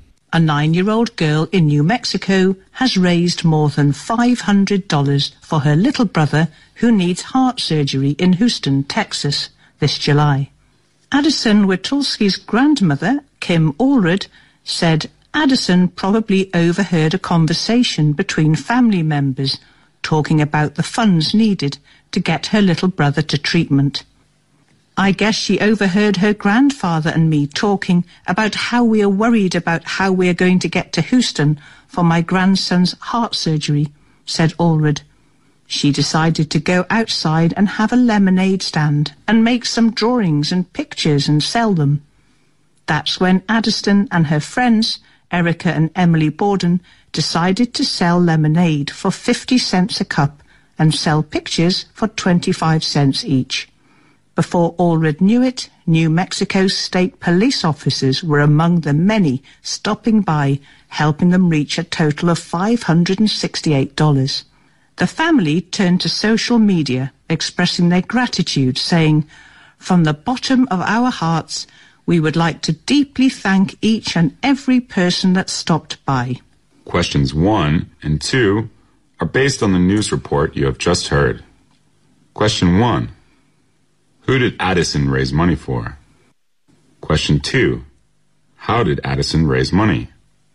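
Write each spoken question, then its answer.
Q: Who did Addison raise money for?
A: Her little brother, who needs heart surgery

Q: How did Addison raise money?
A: By selling lemonade and drawings/pictures at a lemonade stand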